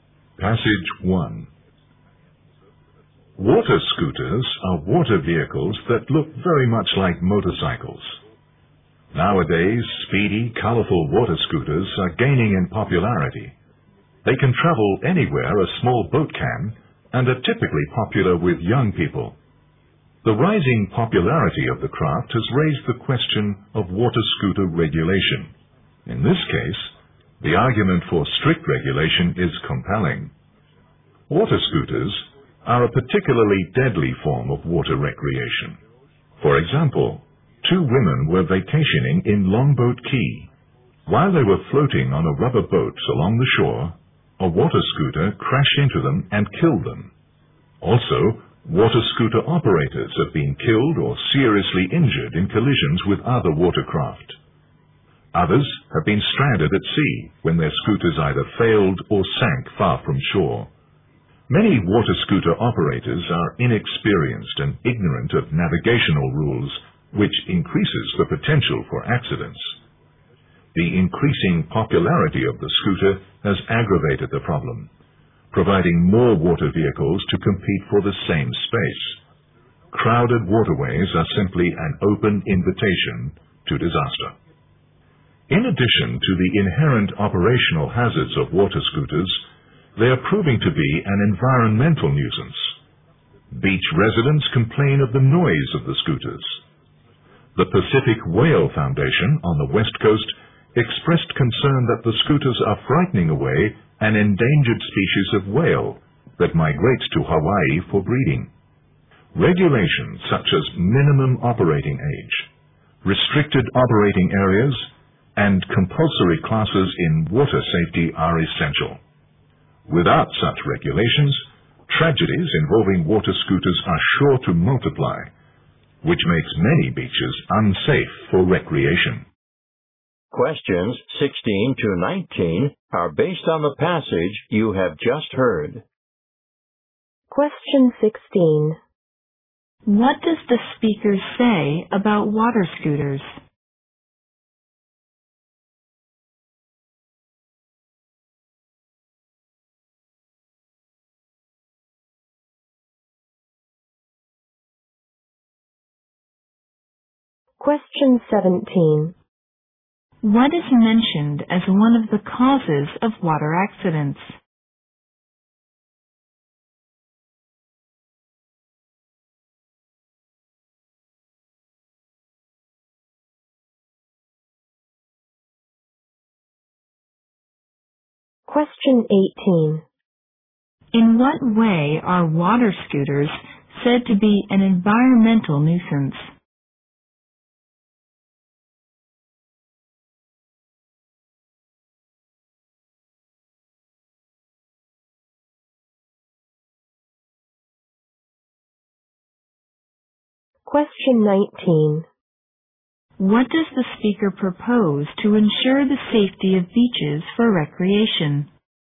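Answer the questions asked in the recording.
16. They are dangerous and should be strictly regulated.
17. Operators who are inexperienced and don't know the navigation rules.
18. They are noisy and frighten away endangered whales.
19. Regulations such as a minimum operating age, restricted areas and compulsory water safety classes.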